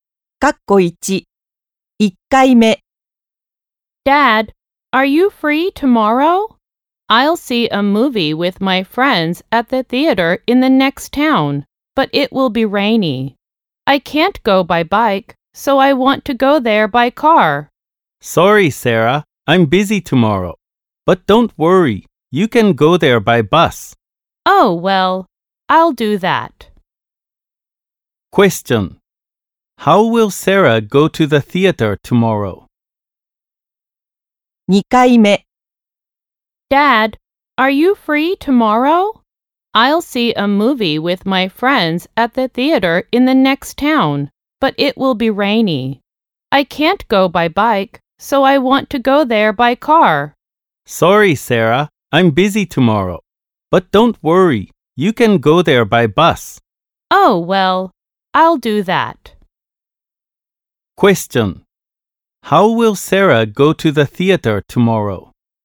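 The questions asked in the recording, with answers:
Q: How will Sarah go to the theater tomorrow?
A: By bus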